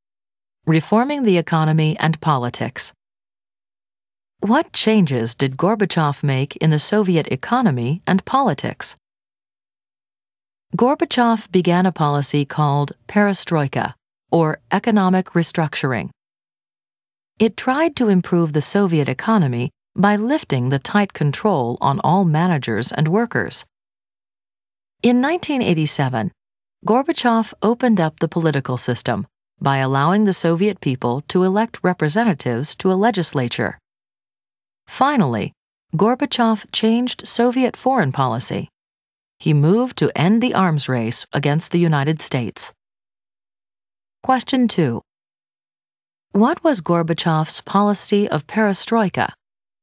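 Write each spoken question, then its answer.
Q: What was Gorbachev's policy of perestroika?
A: Economic restructuring that lifted tight control on managers and workers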